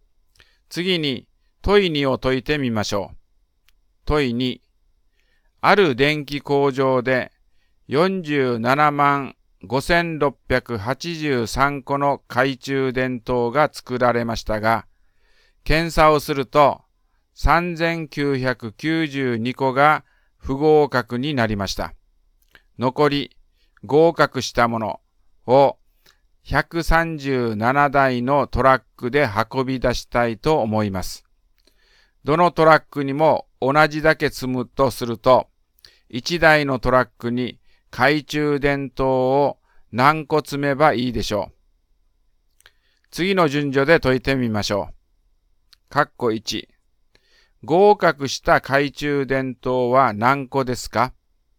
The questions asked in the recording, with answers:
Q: 合格した懐中電灯は何個ですか?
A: 471691個が合格したのです